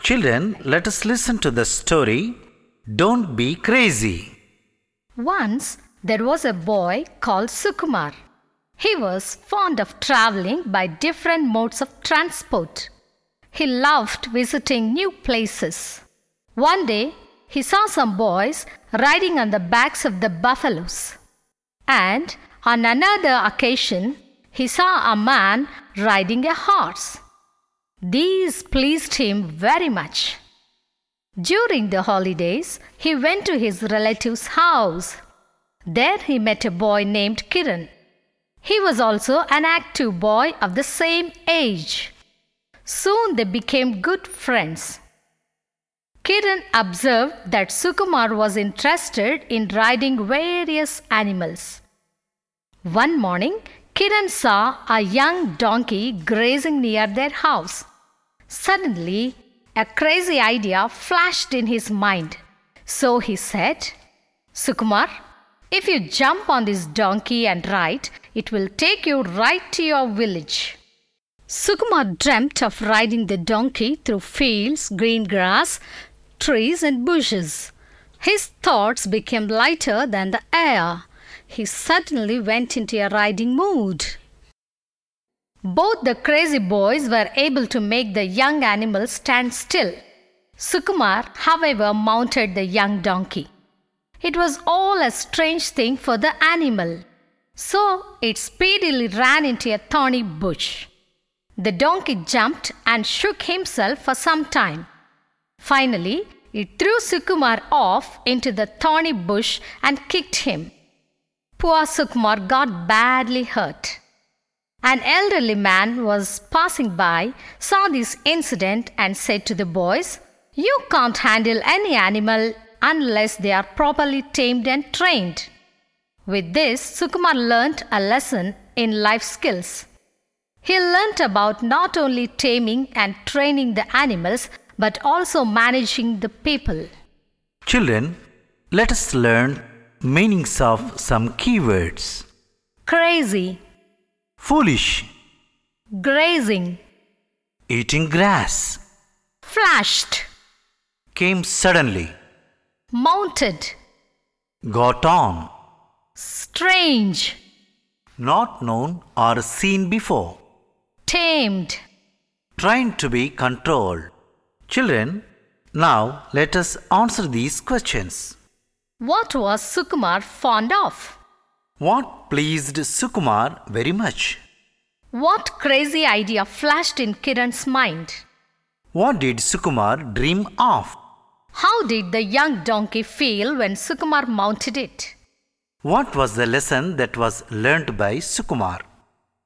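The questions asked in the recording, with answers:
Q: What was Sukumar fond of?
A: Traveling by different modes of transport and visiting new places

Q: What pleased Sukumar very much?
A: Seeing boys riding buffaloes and a man riding a horse

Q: What crazy idea flashed in Kiran's mind?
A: That Sukumar should jump on the young donkey and ride it to his village

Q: What did Sukumar dream of?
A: Riding the donkey through fields, green grass, trees and bushes

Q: How did the young donkey feel when Sukumar mounted it?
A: It felt strange

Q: What was the lesson that was learnt by Sukumar?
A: Animals can't be handled unless properly tamed and trained; managing animals and people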